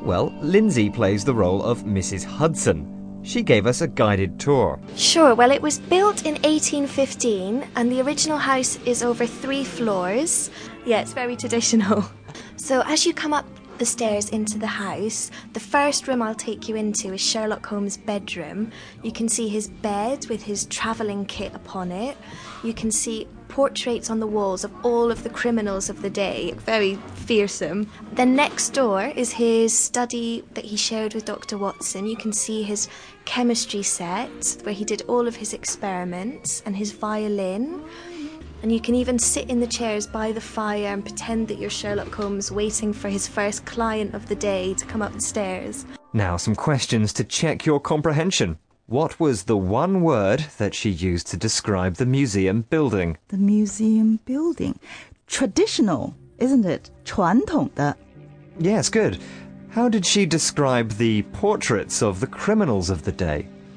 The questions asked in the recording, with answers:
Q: How did she describe the portraits of the criminals of the day?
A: Fearsome.